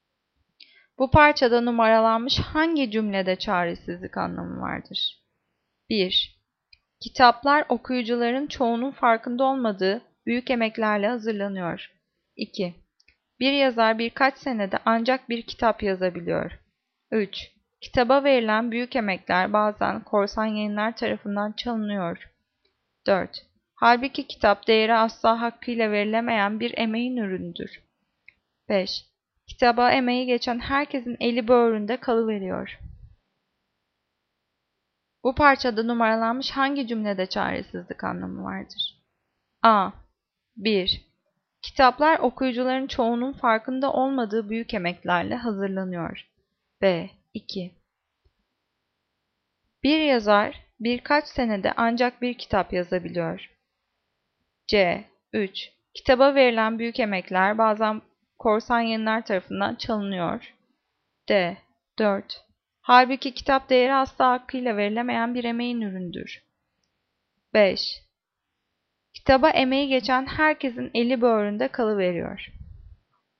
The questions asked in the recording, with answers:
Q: Bu parçada numaralanmış hangi cümlede çaresizlik anlamı vardır?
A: Cevap E. 5. Kitaba emeği geçen herkesin eli böğründe kalıveriyor.